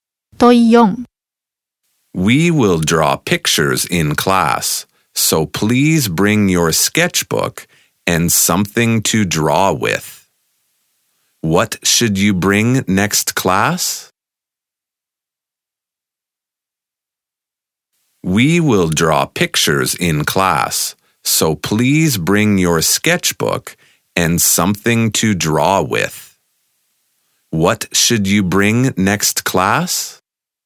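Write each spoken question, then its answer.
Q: What should you bring next class?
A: A sketchbook and something to draw with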